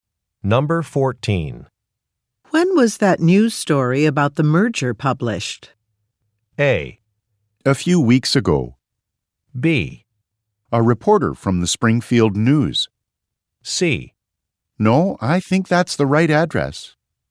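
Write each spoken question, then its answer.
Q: When was that news story about the merger published?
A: A: A few weeks ago.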